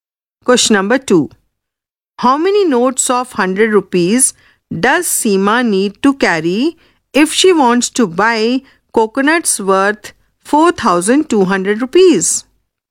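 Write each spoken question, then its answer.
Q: How many notes of 100 rupees does Seema need to carry if she wants to buy coconuts worth 4,200 rupees?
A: 42 notes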